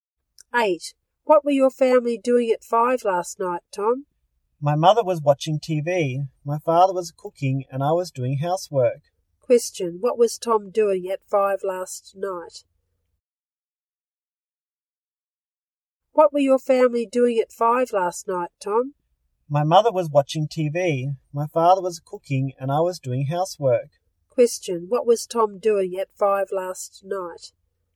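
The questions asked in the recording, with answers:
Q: Question, what was Tom doing at 5 last night?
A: Doing housework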